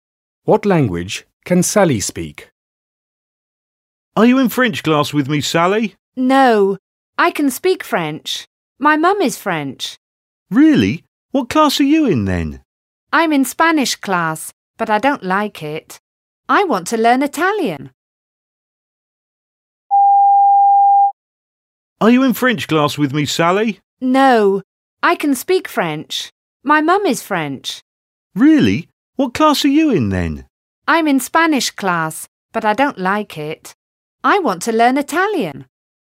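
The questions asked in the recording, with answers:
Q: What language can Sally speak?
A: French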